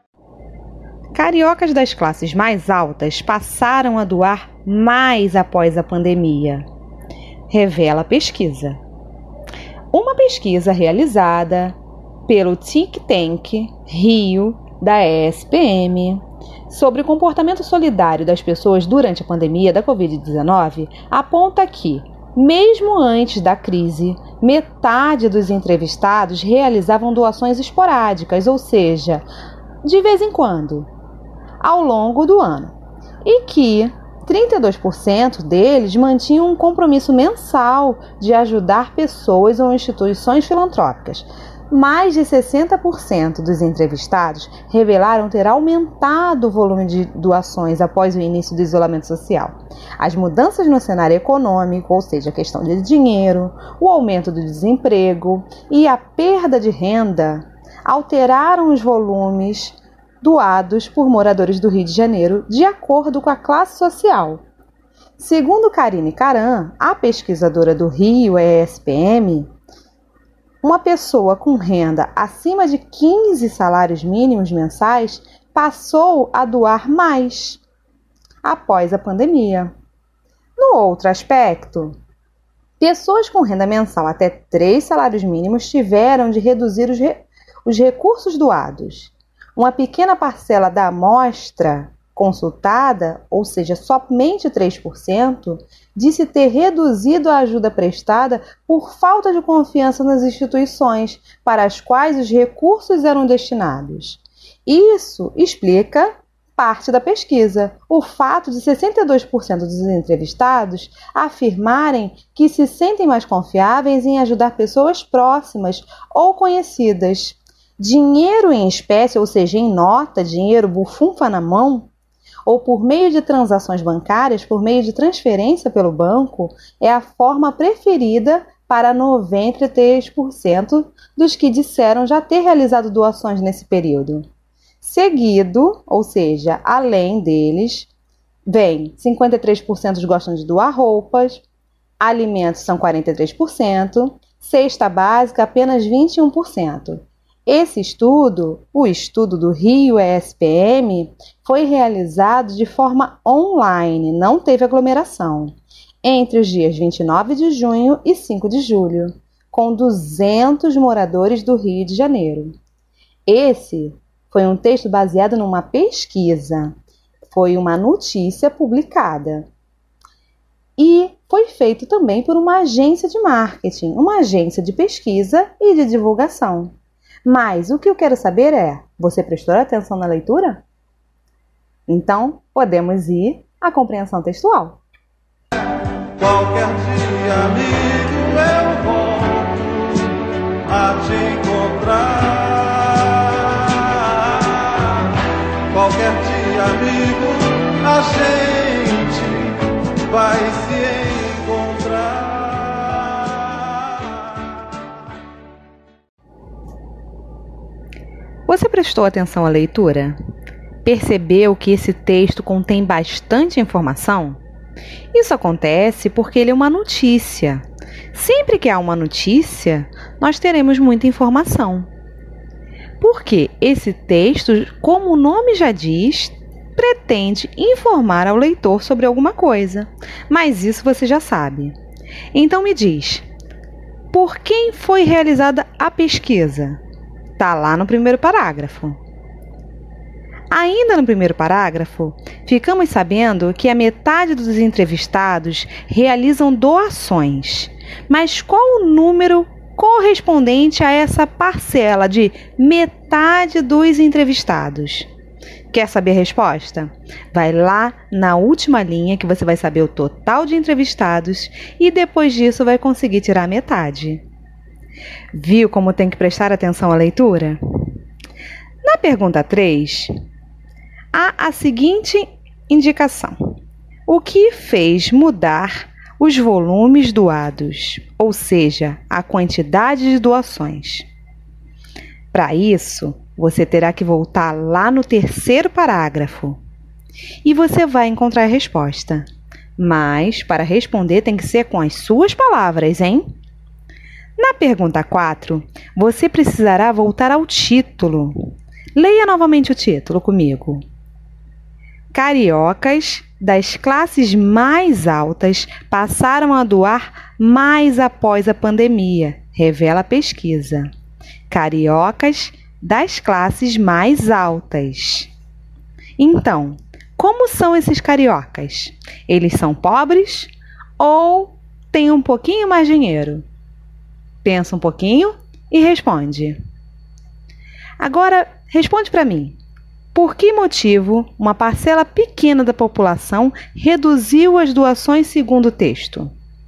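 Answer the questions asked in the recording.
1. Pelo Think Tank Rio da ESPM
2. 100 entrevistados (metade de 200)
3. As mudanças no cenário econômico: aumento do desemprego e perda de renda
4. Têm mais dinheiro (classes mais altas)
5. Por falta de confiança nas instituições que recebiam os recursos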